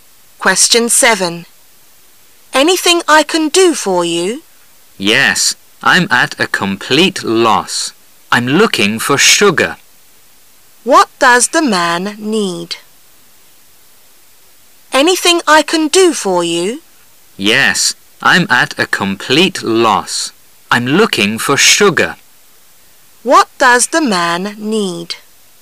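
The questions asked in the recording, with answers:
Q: What does the man need?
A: Sugar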